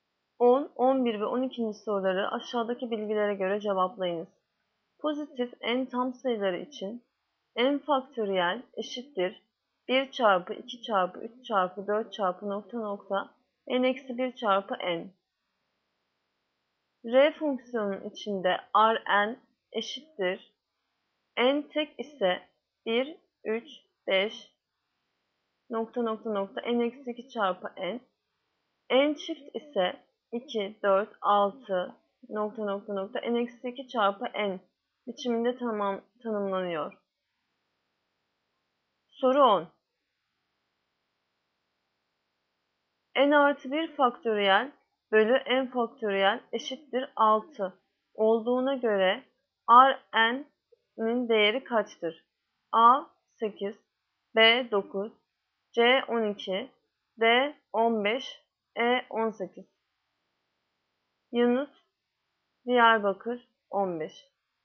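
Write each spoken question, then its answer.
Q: N artı 1 faktöriyel bölü n faktöriyel eşittir 6 olduğuna göre Rn'in değeri kaçtır?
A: D: 15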